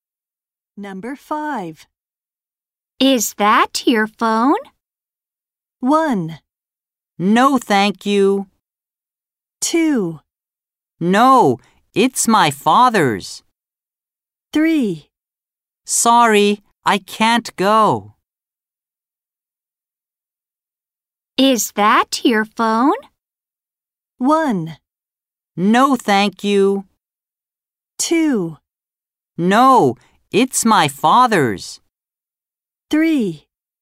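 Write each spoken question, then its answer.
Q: Is that your phone?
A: 2: No, it's my father's.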